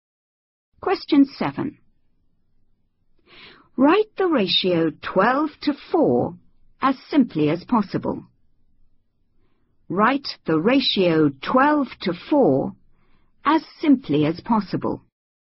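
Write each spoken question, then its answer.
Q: Write the ratio 12 to 4 as simply as possible.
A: 3:1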